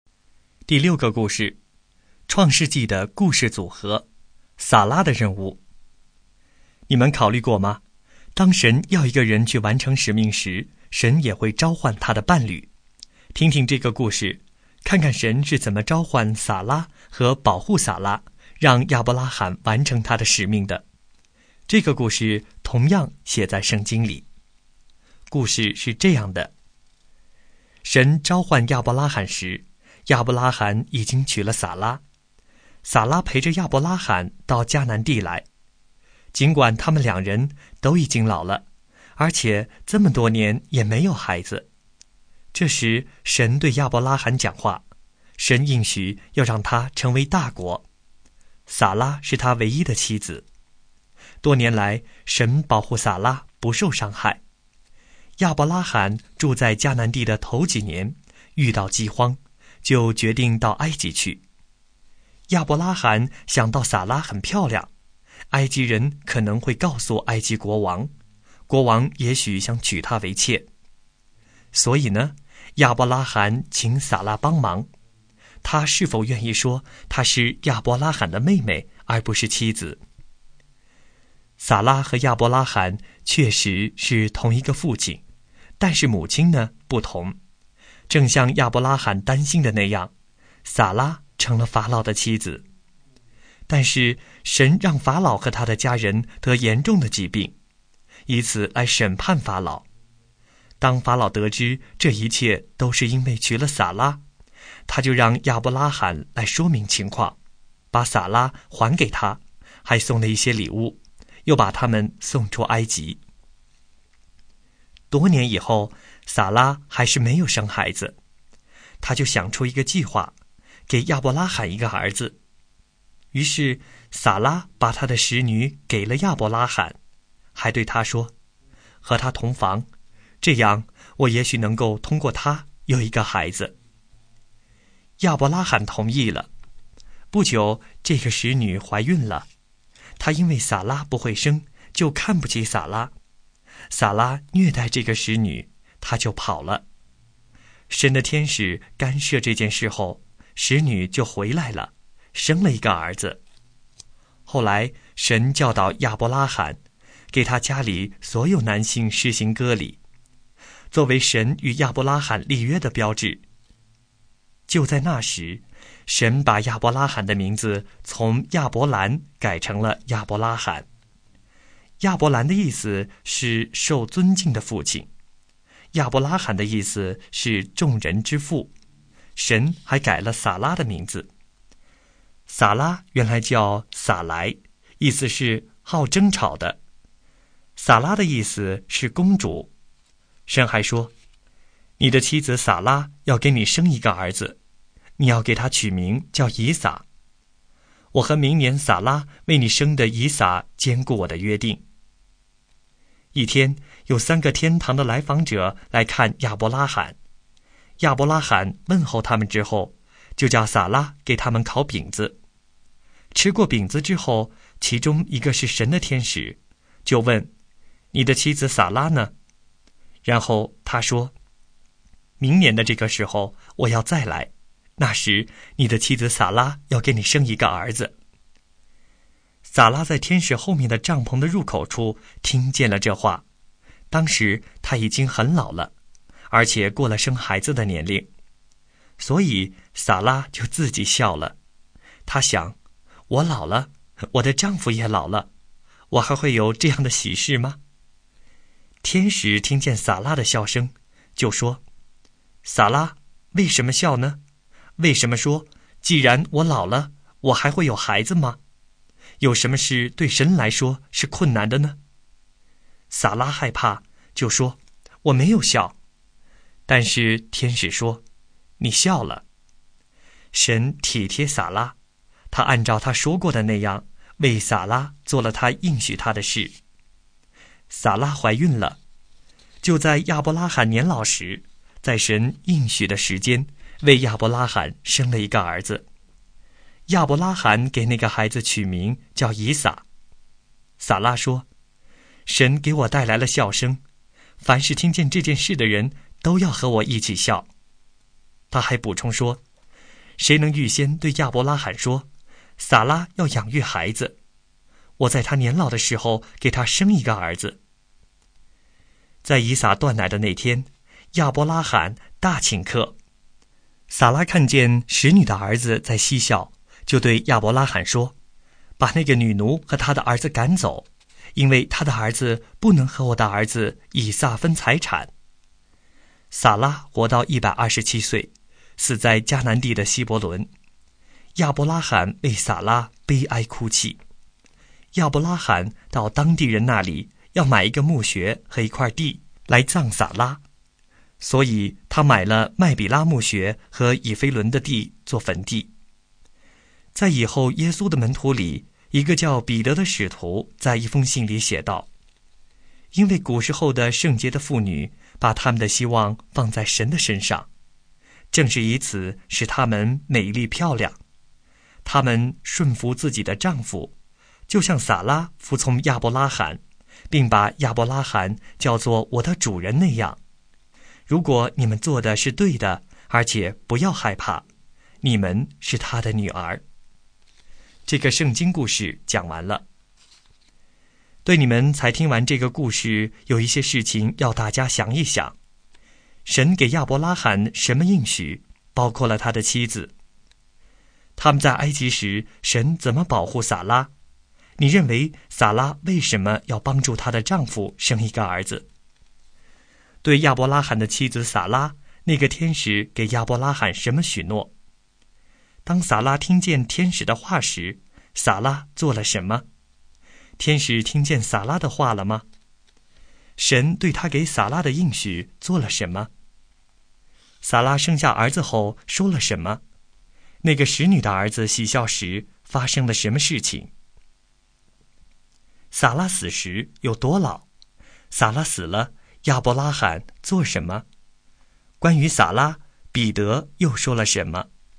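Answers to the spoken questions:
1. 要让他成为大国
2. 让法老和他的家人得严重的疾病,法老就把撒拉还给亚伯拉罕
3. 明年这个时候撒拉要给他生一个儿子
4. 她自己笑了
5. 听见了
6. 照他说过的做了,撒拉怀孕生了儿子
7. 神给我带来了笑声,凡是听见这件事的人都要和我一起笑
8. 撒拉叫亚伯拉罕把使女和她的儿子赶走
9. 127岁
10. 为她哭泣,买了麦比拉墓穴和以弗仑的地做坟地来葬她
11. 撒拉顺服亚伯拉罕,称他为我的主人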